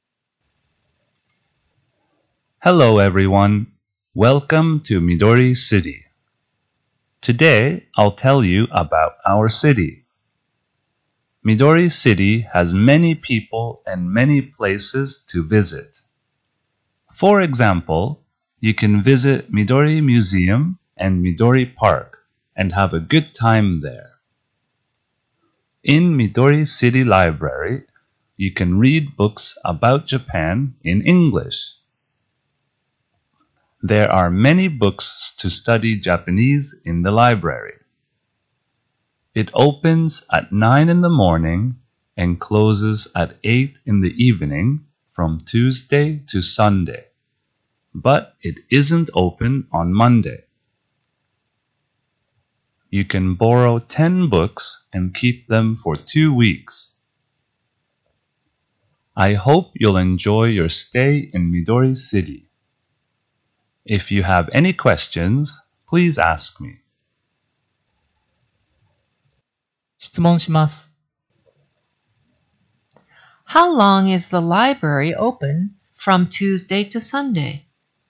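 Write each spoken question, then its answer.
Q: How long is the library open from Tuesday to Sunday?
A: For eleven hours.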